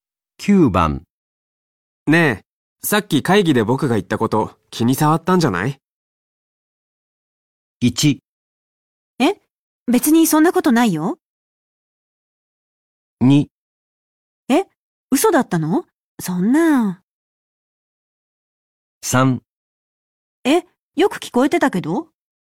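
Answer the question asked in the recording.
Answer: 1: え別にそんなことないよ。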